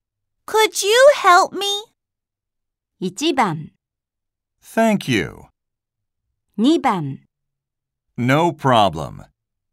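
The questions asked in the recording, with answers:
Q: Could you help me?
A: 2: No problem.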